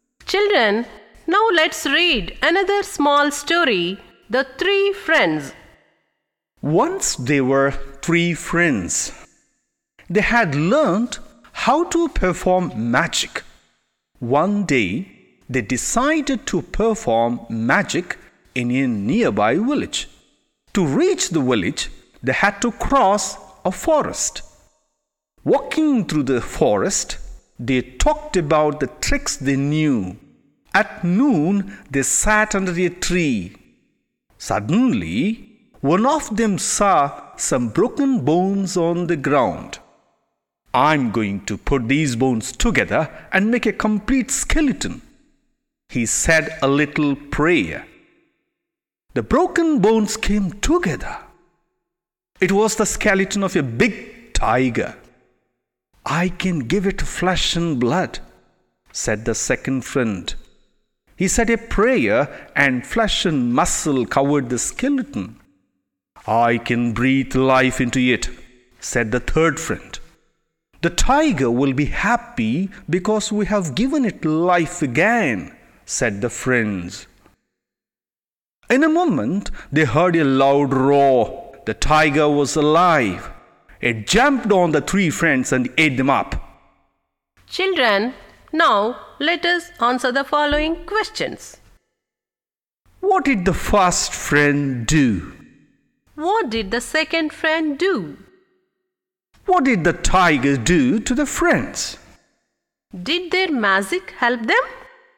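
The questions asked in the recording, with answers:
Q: What did the first friend do?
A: He put the broken bones together into a complete skeleton.

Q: What did the second friend do?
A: He gave the skeleton flesh and blood.

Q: What did the tiger do to the friends?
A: It jumped on them and ate them up.

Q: Did their magic help them?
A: No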